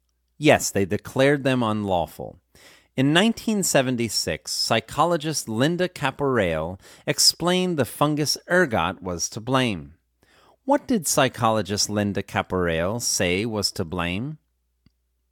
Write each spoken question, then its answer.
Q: What did psychologist Linda Caporale say was to blame?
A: Psychologist Linda Caporale said the fungus ergot was to blame.